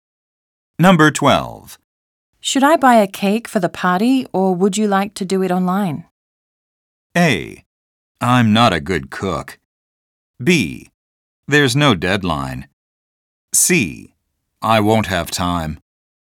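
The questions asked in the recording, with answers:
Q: Should I buy a cake for the party, or would you like to do it online?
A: C: I won't have time.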